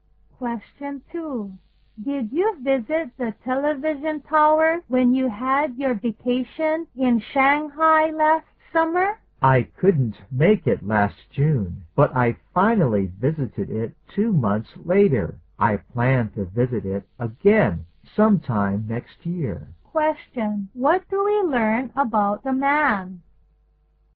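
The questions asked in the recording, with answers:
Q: What do we learn about the man?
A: He visited the television tower in Shanghai last August and plans to visit it again next year.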